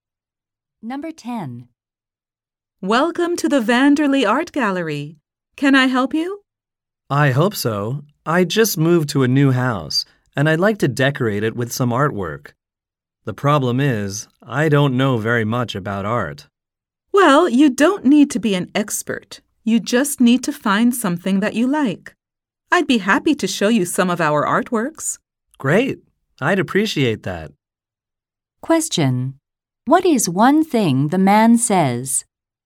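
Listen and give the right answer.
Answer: He doesn't know much about art.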